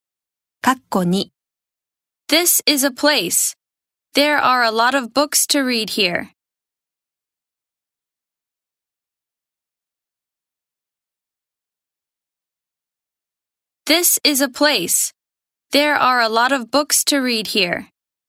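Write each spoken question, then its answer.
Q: This is a place. There are a lot of books to read here.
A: library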